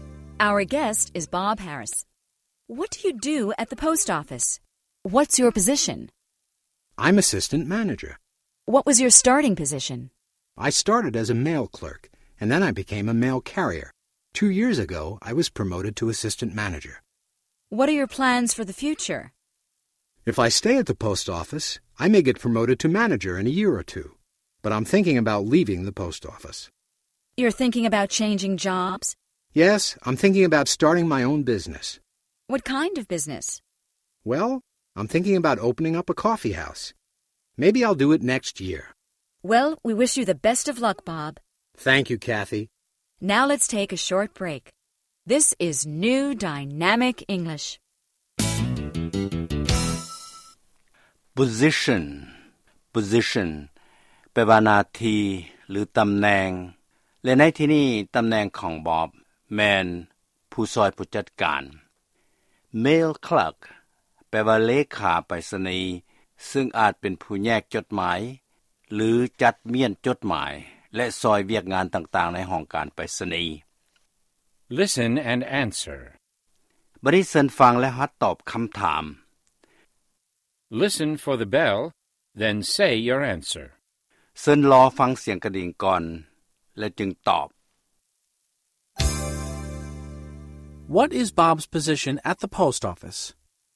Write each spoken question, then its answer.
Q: What is Bob's position at the post office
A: He's assistant manager.